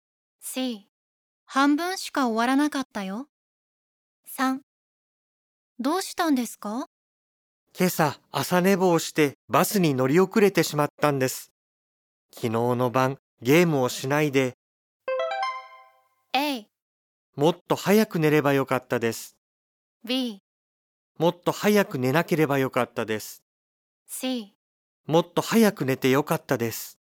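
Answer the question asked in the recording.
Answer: A: もっと早く寝ればよかったです。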